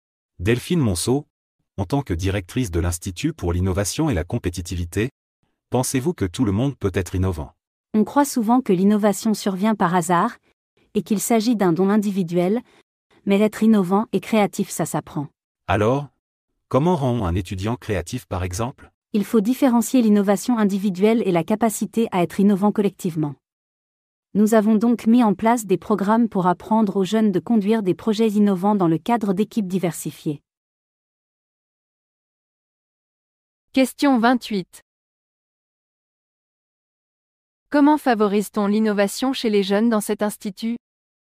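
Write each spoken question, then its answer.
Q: Comment favorise-t-on l'innovation chez les jeunes dans cet institut?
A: Par des programmes qui leur apprennent à conduire des projets innovants dans des équipes diversifiées.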